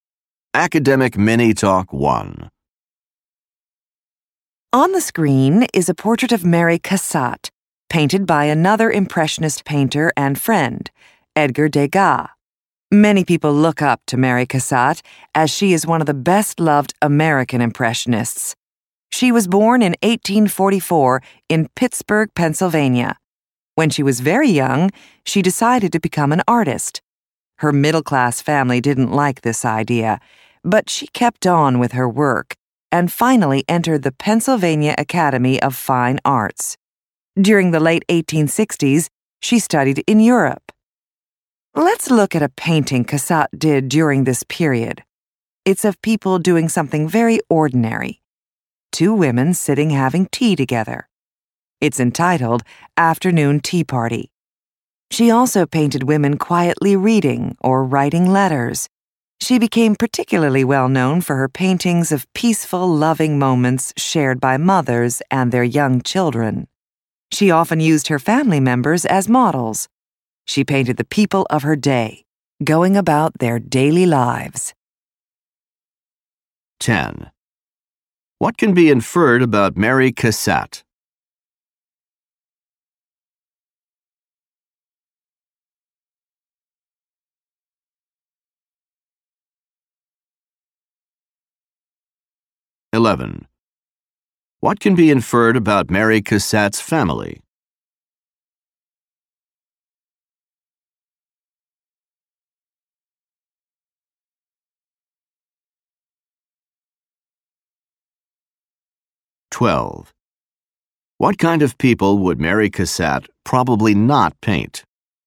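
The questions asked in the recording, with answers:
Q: What can be inferred about Mary Cassatt's family?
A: They didn't want her to become an artist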